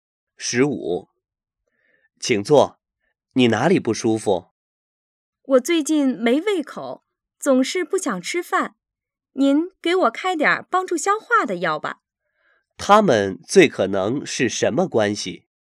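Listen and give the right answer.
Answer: 医生和病人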